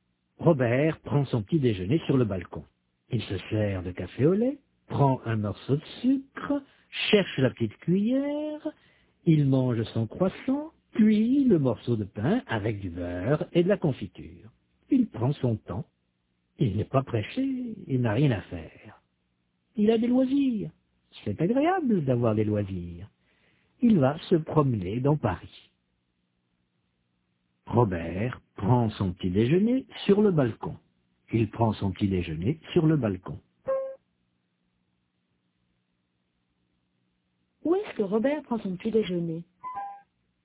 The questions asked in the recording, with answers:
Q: Où est-ce que Robert prend son petit déjeuner ?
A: Sur le balcon.